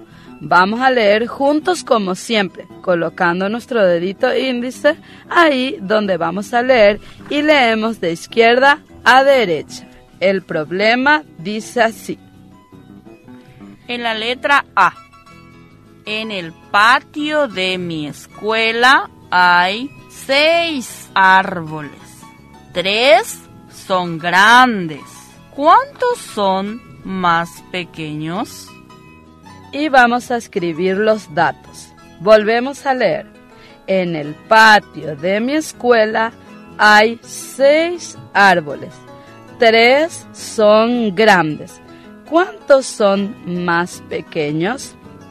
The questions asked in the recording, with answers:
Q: ¿Cuántos son más pequeños?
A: El resultado es 3. Árboles pequeños y escribimos el número 3.